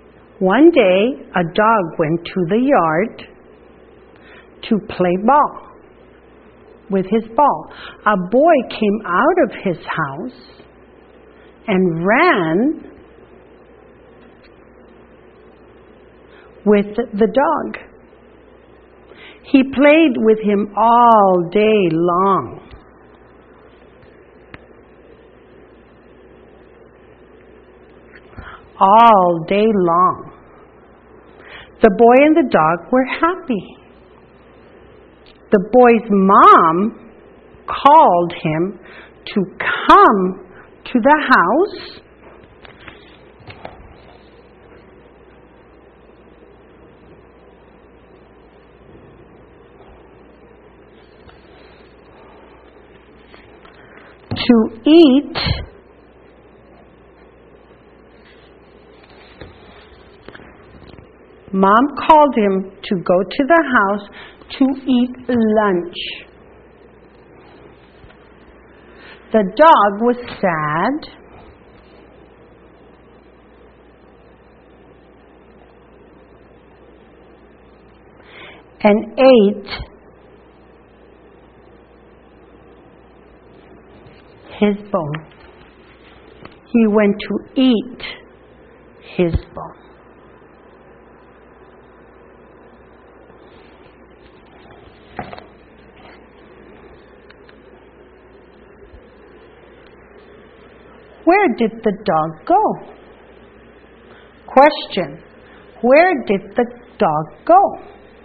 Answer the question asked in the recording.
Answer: A dog went to the yard.